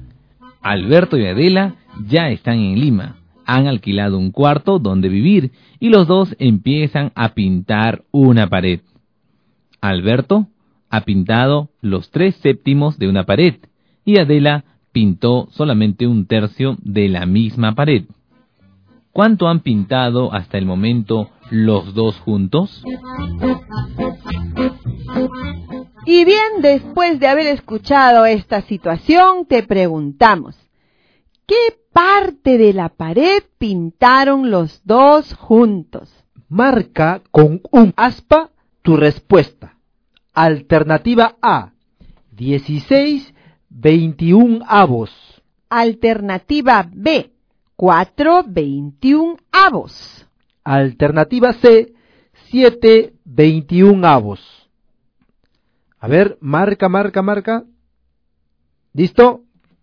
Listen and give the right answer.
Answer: Entonces, los dos juntos pintaron 16/21 de pared.